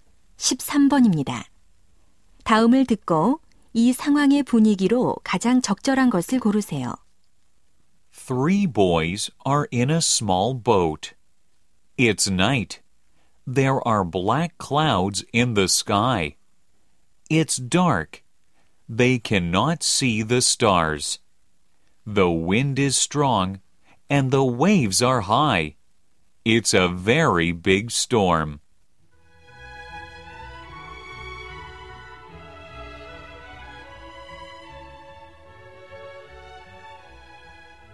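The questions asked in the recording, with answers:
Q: 다음을 듣고 이 상황의 분위기로 가장 적절한 것을 고르세요.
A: 무섭고 위험한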